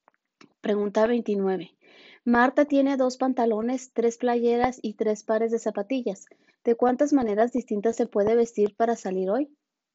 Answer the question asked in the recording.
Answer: Y la respuesta correcta es D, 18.